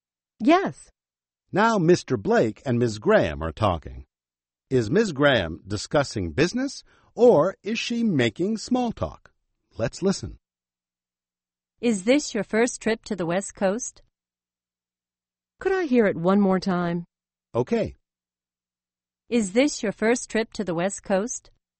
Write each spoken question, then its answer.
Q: Is Ms. Graham discussing business or is she making small talk?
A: I think it's small talk.